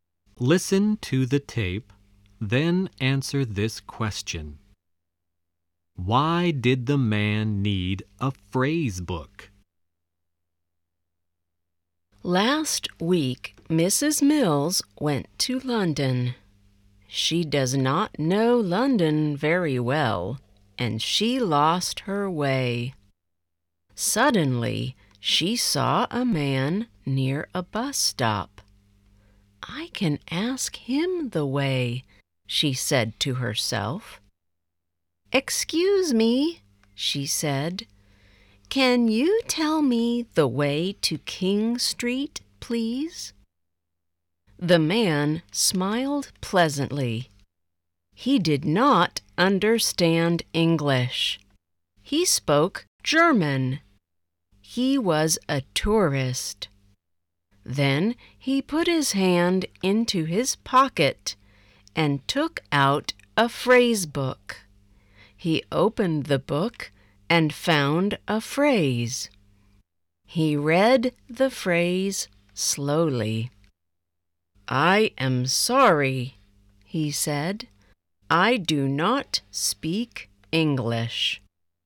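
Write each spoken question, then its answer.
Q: Why did the man need a phrase book?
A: Because he did not speak English; he was a German tourist.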